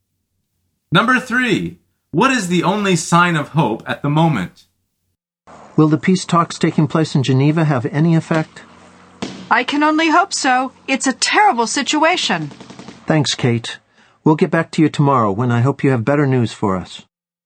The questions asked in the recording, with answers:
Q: What is the only sign of hope at the moment?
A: The answer is the peace talks in Geneva.